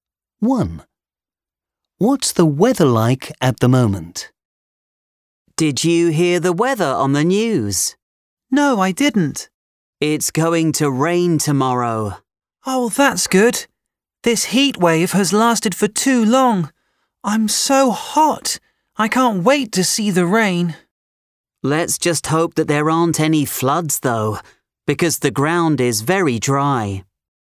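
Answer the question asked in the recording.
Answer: Hot and dry (a heat wave)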